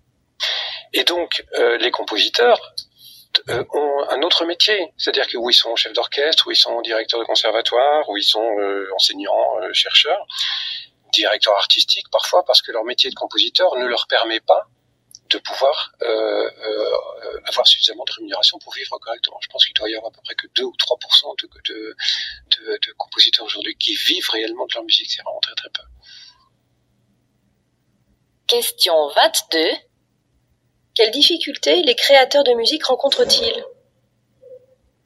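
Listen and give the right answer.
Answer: Leur métier de compositeur ne leur rapporte pas assez pour vivre : ils doivent exercer un autre métier (seuls 2 ou 3 % vivent de leur musique).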